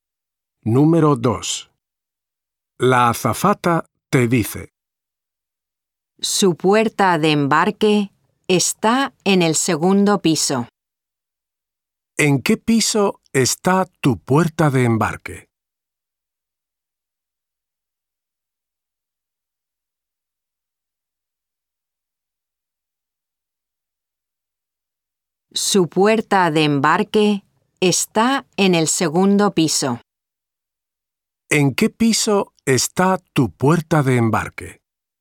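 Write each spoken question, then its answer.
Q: ¿En qué piso está tu puerta de embarque?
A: en el segundo piso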